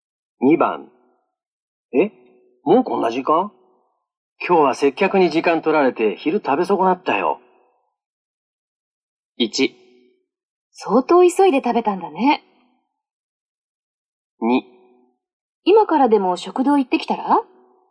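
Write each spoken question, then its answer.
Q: えもうこんな時間今日は接客に時間取られて昼食べ損なったよ。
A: 2: 今からでも食堂行ってきたら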